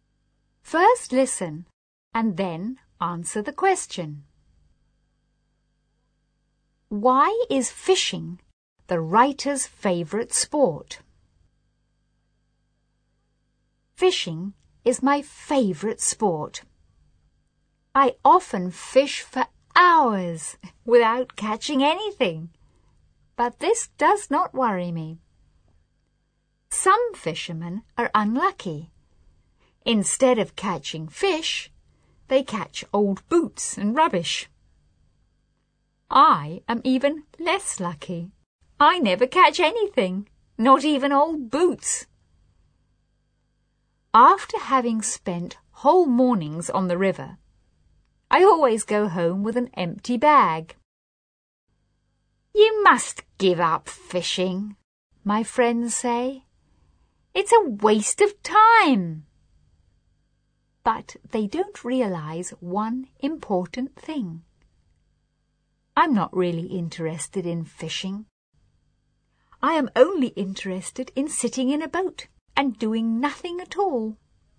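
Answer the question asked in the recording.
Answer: Because he can sit in a boat and do nothing at all.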